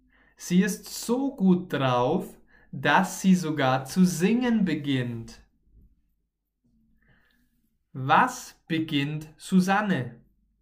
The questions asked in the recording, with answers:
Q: Was beginnt Susanne?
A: Zu singen. Susanne beginnt zu singen.